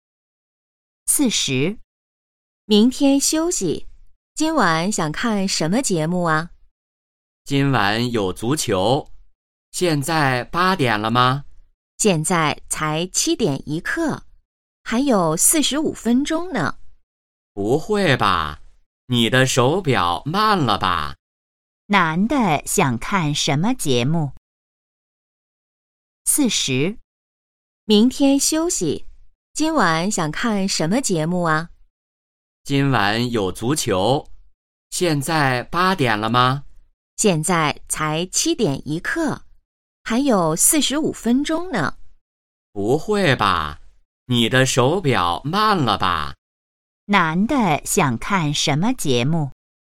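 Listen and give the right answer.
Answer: 足球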